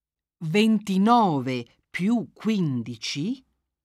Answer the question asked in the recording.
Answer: fa 44.